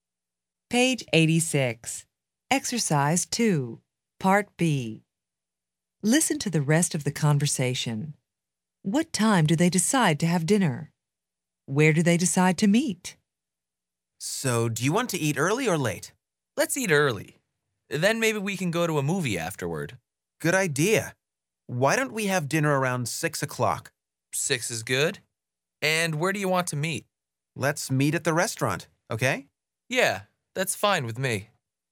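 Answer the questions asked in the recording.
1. Around 6 o'clock
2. At the restaurant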